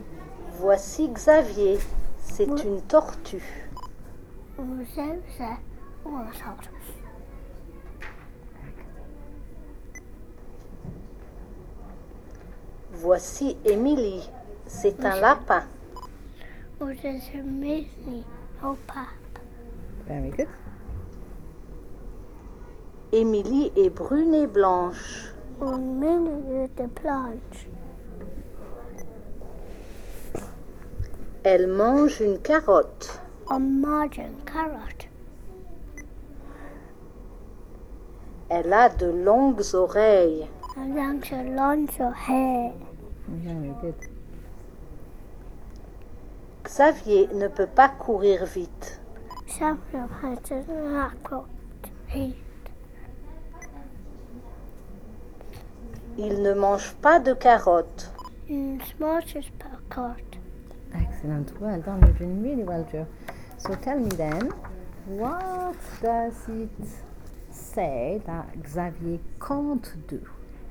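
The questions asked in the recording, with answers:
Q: So tell me then, what does it say that Xavier can't do?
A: Run fast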